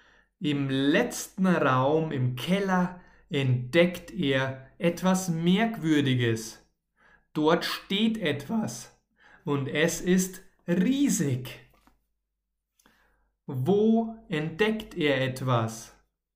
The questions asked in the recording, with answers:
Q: Wo entdeckt er etwas?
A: Im letzten Raum im Keller.